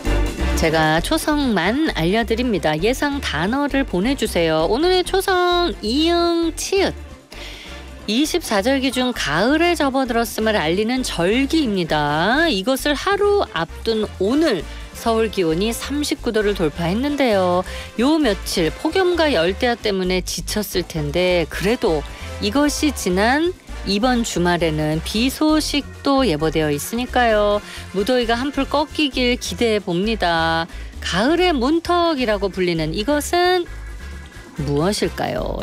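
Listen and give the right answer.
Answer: 입추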